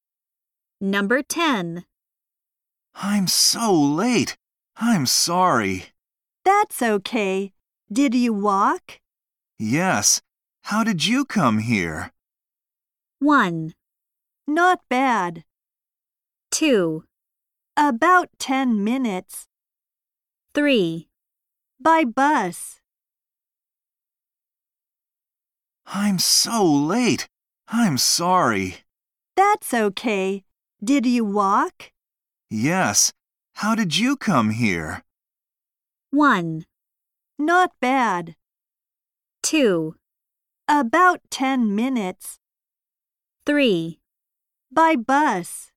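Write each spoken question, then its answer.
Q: Yes. How did you come here?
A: 3: By bus.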